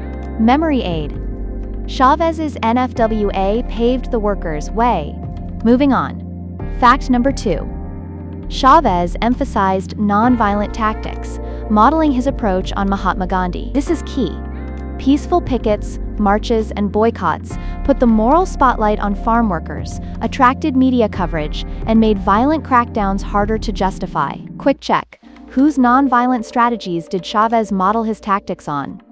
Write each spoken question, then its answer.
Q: Whose nonviolent strategies did Chavez model his tactics on?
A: Gandhi.